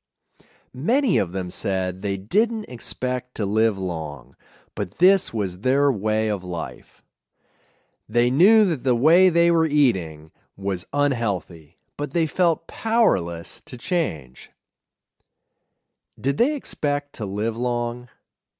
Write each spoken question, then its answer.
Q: Did they expect to live long?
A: No, they didn't expect to live long.